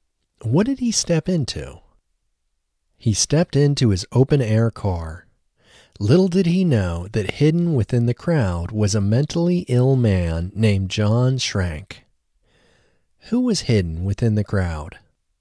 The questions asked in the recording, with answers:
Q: Who was hidden within the crowd?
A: A mentally ill man named John Schrank was hidden within the crowd.